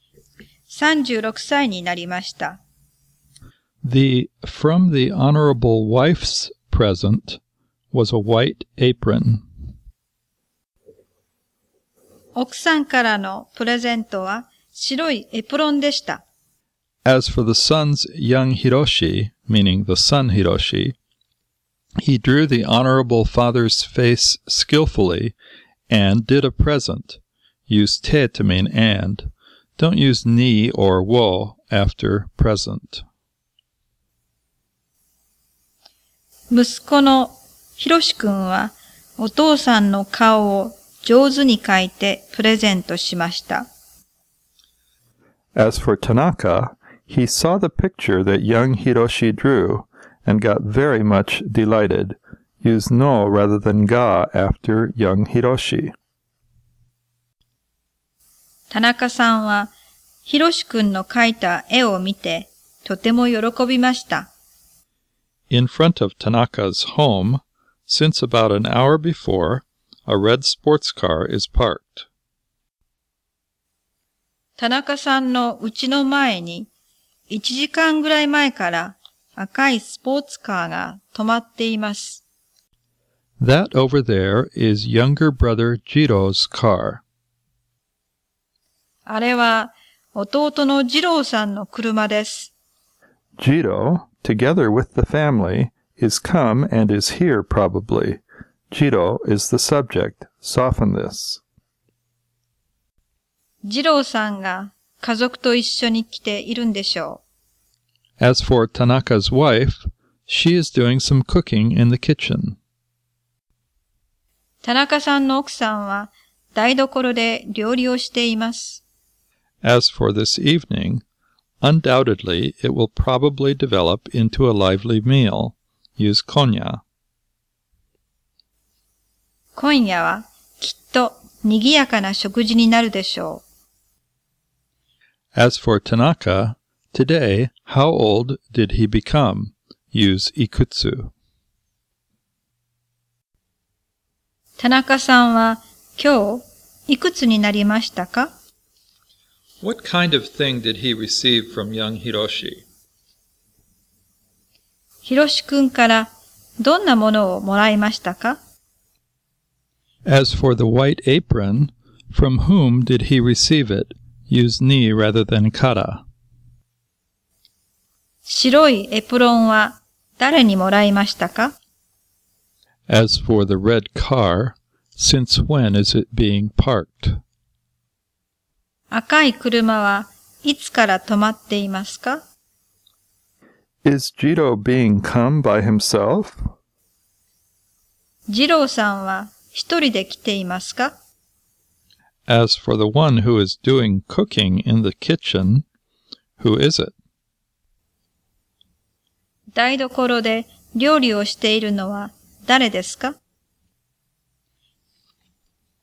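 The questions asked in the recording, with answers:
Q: As for Tanaka, today, how old did he become?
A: 36 years old

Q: What kind of thing did he receive from young Hiroshi?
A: A picture of his (Tanaka's) face that Hiroshi drew

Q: As for the white apron, from whom did he receive it?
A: From his wife

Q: As for the red car,Since when is it being parked?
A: Since about an hour ago

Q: Is Jiro being come by himself?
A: No, he came with his family

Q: As for the one who is doing cooking in the kitchen, who is it?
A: Tanaka's wife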